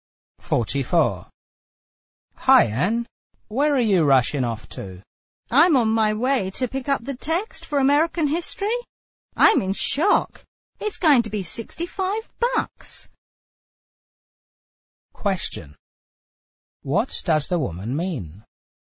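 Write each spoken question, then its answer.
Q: What does the woman mean?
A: The textbook is surprisingly expensive.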